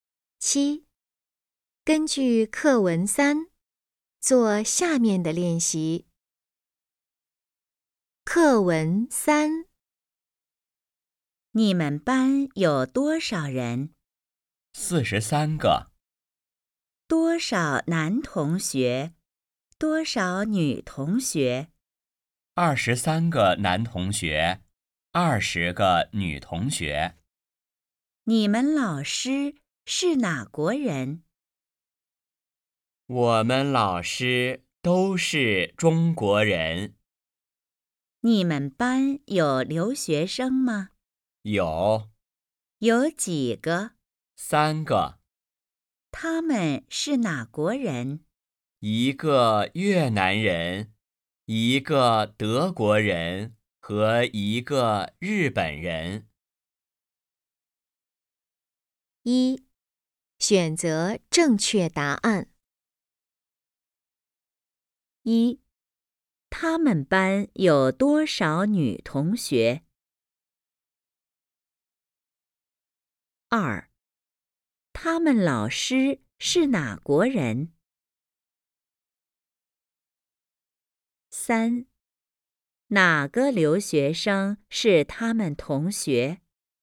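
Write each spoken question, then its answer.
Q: 他们班有多少女同学?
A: 20个

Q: 他们老师是哪国人?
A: 中国人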